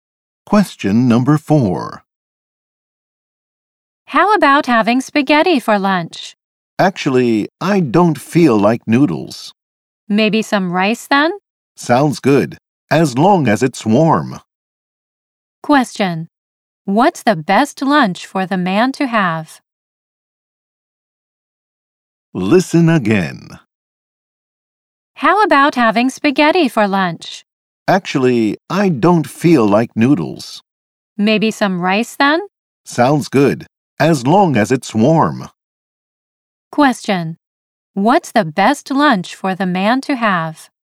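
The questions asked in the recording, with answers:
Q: What's the best lunch for the man to have?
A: A warm rice dish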